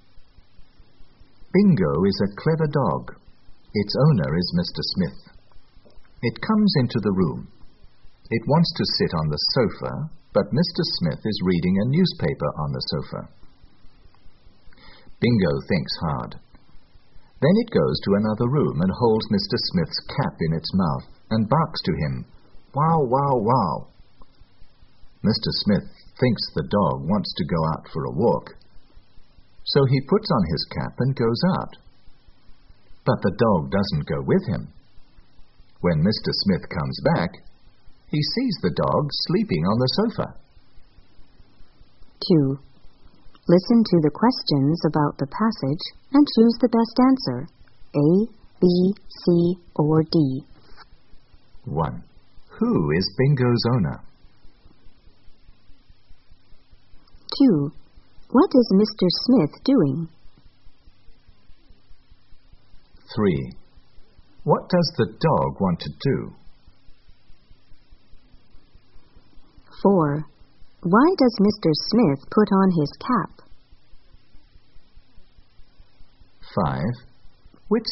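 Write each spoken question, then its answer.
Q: Who is Bingo's owner?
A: Mr. Smith

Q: What is Mr. Smith doing?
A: Reading a newspaper on the sofa

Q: What does the dog want to do?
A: Sit on the sofa

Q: Why does Mr. Smith put on his cap?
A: He thinks the dog wants to go out for a walk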